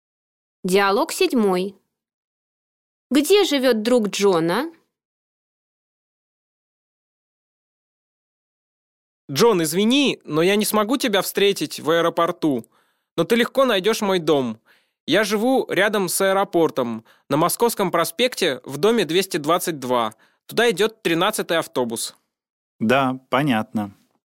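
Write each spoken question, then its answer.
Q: Где живет друг Джона?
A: Рядом с аэропортом, на Московском проспекте, дом 222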